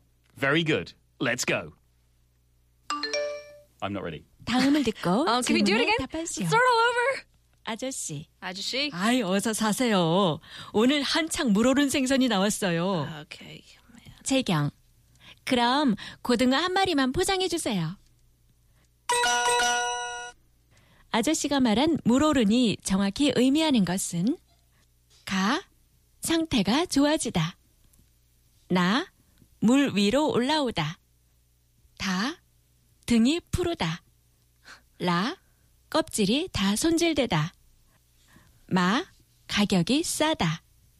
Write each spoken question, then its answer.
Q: 아저씨가 말한 물오른이 정확히 의미하는 것은 가, 상태가 좋아지다. 나, 물 위로 올라오다. 다, 등이 푸르다. 라, 껍질이 다 손질되다. 마, 가격이 싸다.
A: 가 상태가 좋아지다.